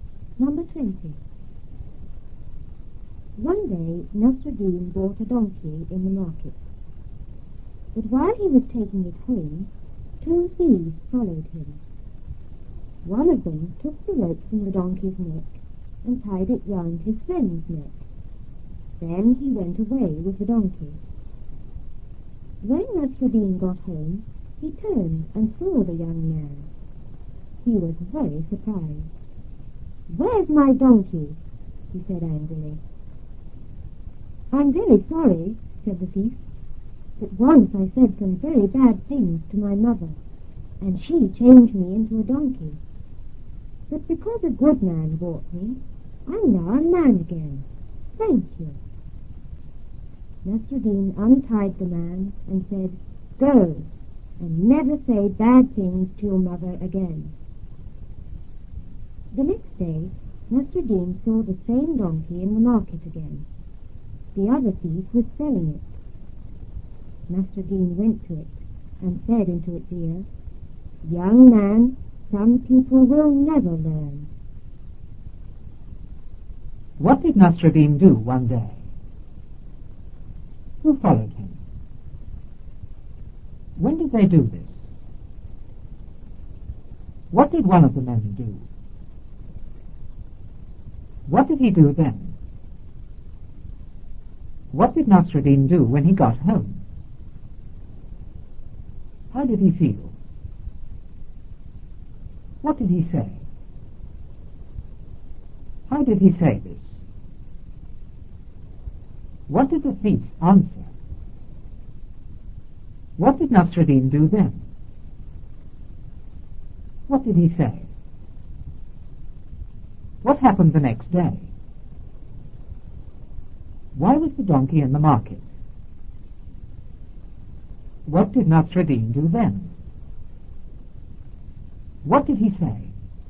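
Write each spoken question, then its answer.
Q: What did Nasruddin do one day?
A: He bought a donkey in the market.

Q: Who followed him?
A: Two thieves.

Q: When did they do this?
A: While he was taking the donkey home.

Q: What did one of the men do?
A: He took the rope from the donkey's neck and tied it round his friend's neck.

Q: What did he do then?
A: He went away with the donkey.

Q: What did Nasruddin do when he got home?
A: He turned and saw the young man.

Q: How did he feel?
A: Very surprised.

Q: What did he say?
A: "Where's my donkey?"

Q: How did he say this?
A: Angrily.

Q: What did the thief answer?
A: That his mother had changed him into a donkey for saying bad things, and he became a man again because a good man bought him.

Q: What did Nasruddin do then?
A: He untied the man.

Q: What did he say?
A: "Go, and never say bad things to your mother again."

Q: What happened the next day?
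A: Nasruddin saw the same donkey in the market again.

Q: Why was the donkey in the market?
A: The other thief was selling it.

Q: What did Nasruddin do then?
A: He went to the donkey and spoke into its ear.

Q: What did he say?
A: "Young man, some people will never learn."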